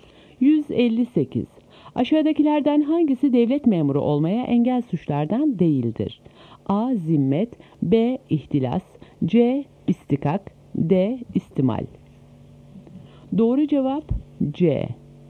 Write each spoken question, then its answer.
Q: Aşağıdakilerden hangisi devlet memuru olmaya engel suçlardan değildir?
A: Doğru cevap C.